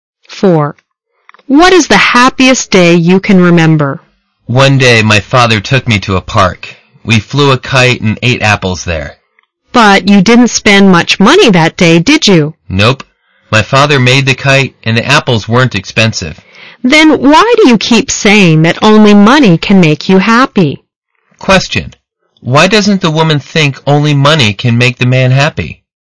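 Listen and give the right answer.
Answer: Because his happiest day, flying a kite and eating apples in a park with his father, cost very little money.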